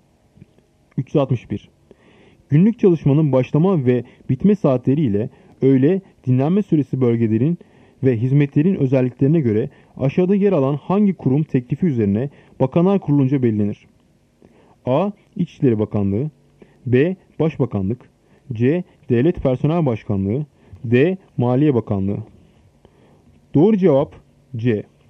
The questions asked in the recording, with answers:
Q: Günlük çalışmanın başlama ve bitme saatleri ile öğle dinlenme süresi bölgelerin ve hizmetlerin özelliklerine göre aşağıda yer alan hangi kurum teklifi üzerine Bakanlar Kurulu'nca belirlenir?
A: Doğru cevap C. Devlet Personel Başkanlığı.